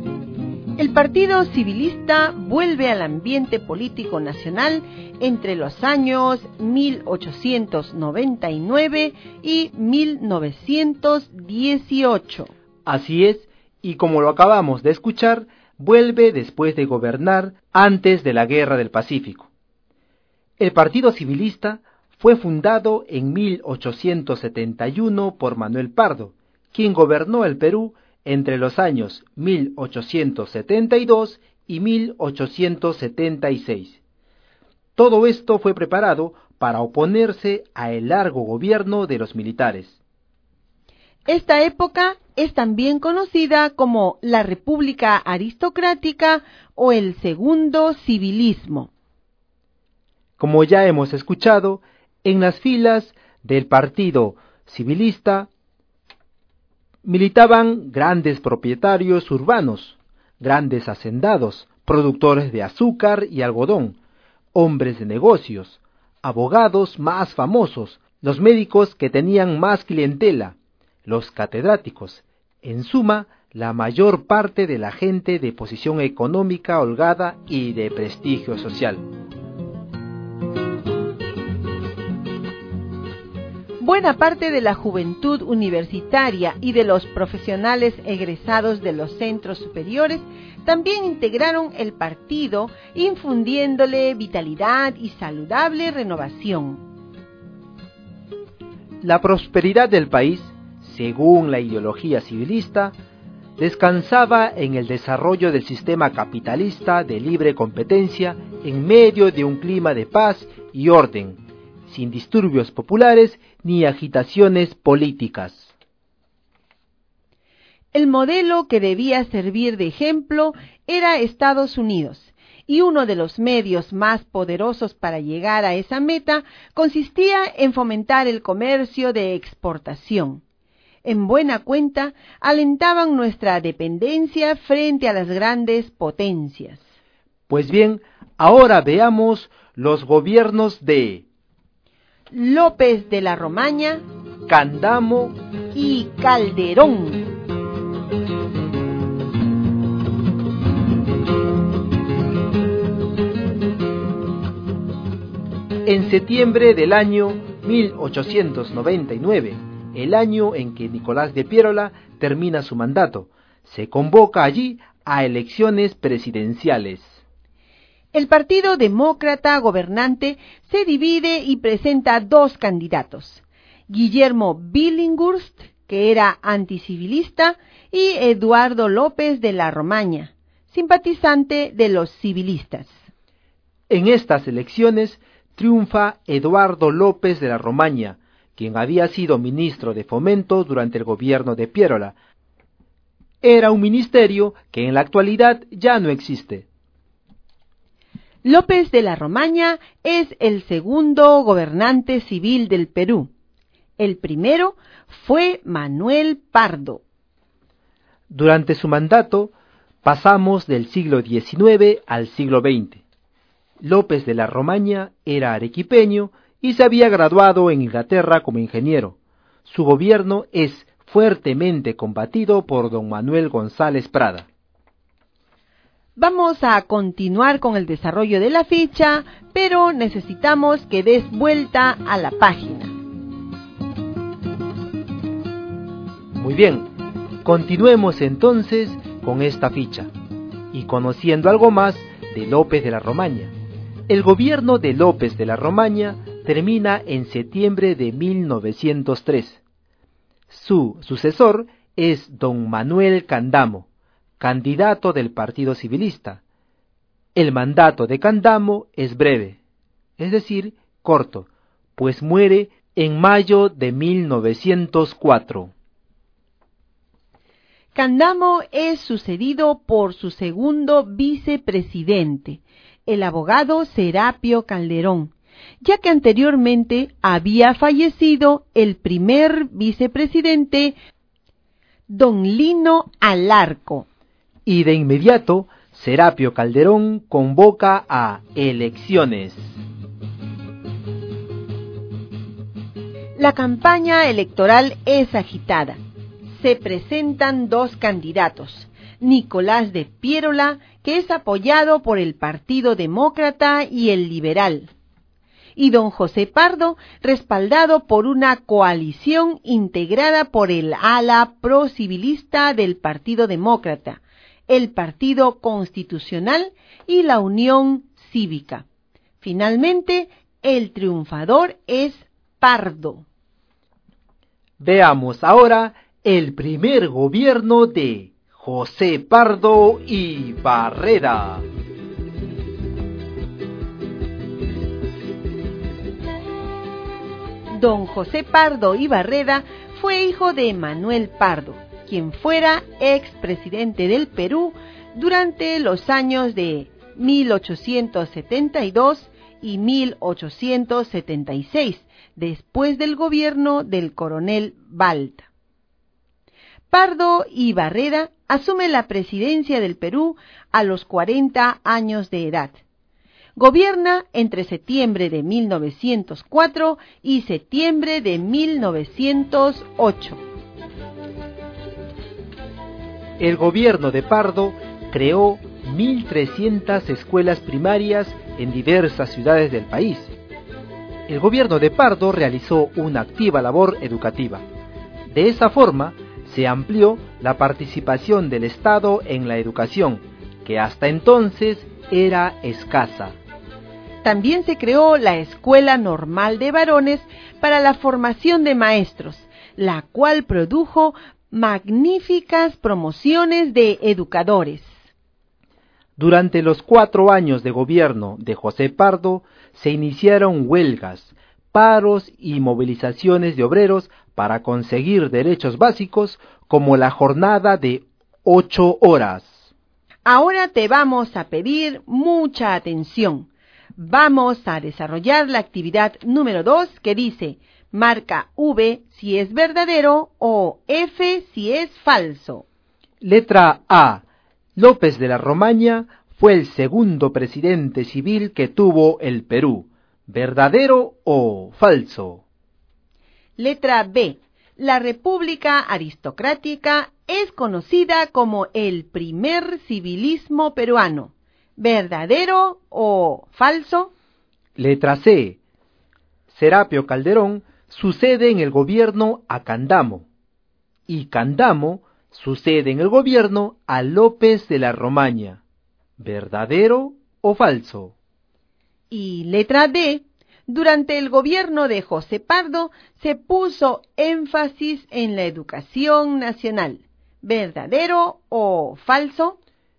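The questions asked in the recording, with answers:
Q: Letra A. López de la Romaña fue el segundo presidente civil que tuvo el Perú.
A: Verdadero

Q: Letra B. La República Aristocrática es conocida como el primer civilismo peruano.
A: Falso

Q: Letra C. Serapio Calderón sucede en el gobierno a Candamo.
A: Verdadero

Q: Y letra D. Durante el gobierno de José Pardo se puso énfasis en la educación nacional.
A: Verdadero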